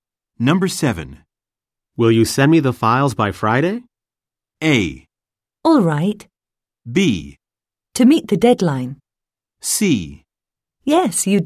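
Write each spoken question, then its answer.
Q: Will you send me the files by Friday?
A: A: All right.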